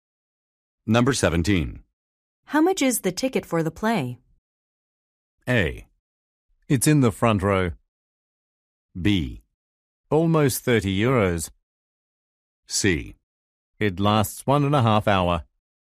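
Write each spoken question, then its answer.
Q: How much is the ticket for the play?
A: B: Almost 30 euros.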